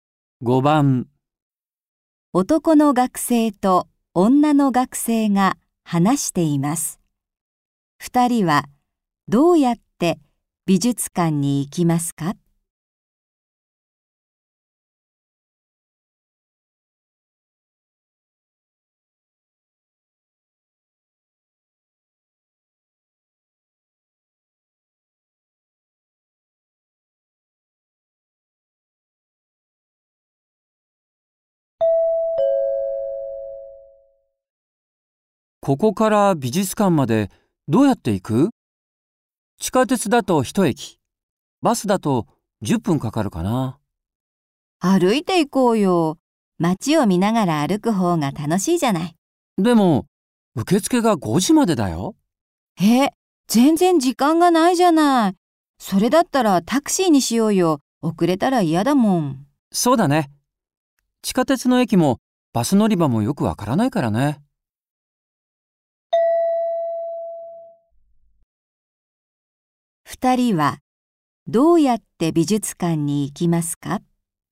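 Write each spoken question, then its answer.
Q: 二人はどうやって美術館に行きますか?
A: タクシーで行く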